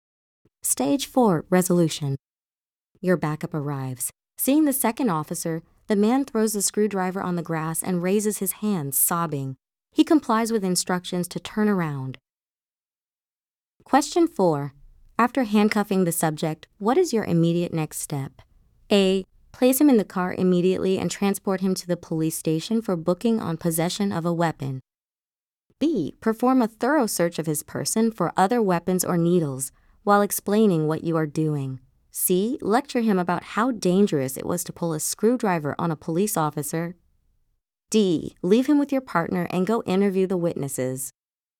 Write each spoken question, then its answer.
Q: After handcuffing the subject, what is your immediate next step?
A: The correct answer is B.